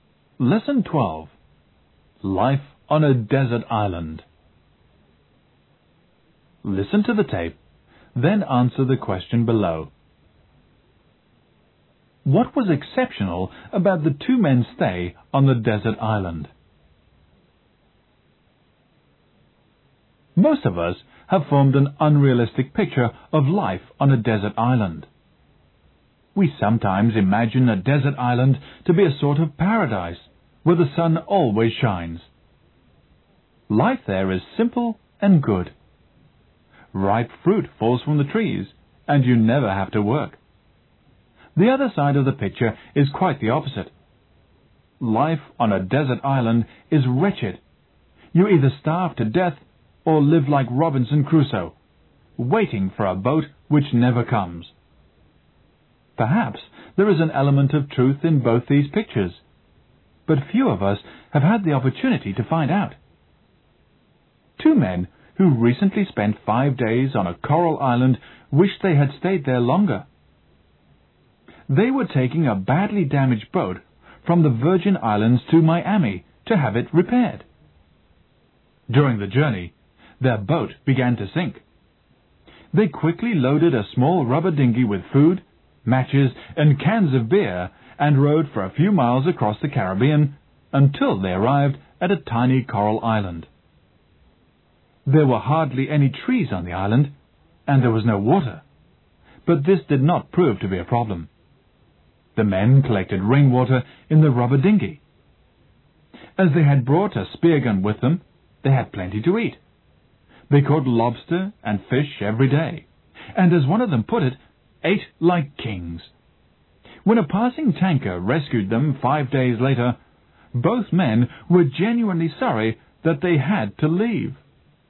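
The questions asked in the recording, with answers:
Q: What was exceptional about the two men's stay on the desert island?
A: They enjoyed it and wished they had stayed longer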